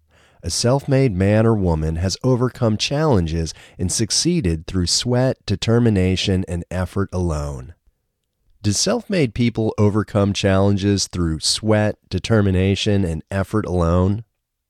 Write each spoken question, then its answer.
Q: Do self-made people overcome challenges through sweat, determination, and effort alone?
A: Yes, self-made people overcome challenges through sweat, determination, and effort alone.